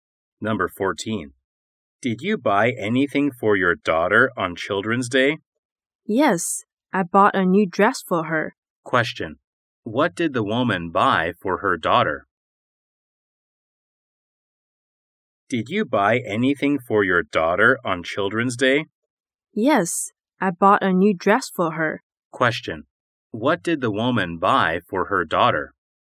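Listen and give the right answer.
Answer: A new dress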